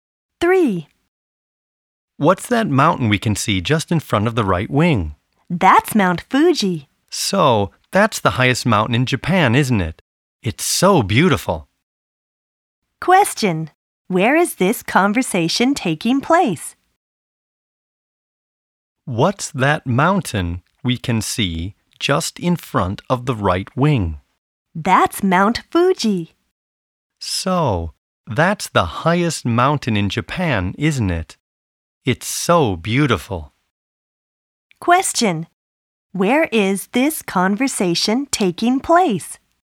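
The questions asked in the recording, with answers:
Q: Where is this conversation taking place?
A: On an airplane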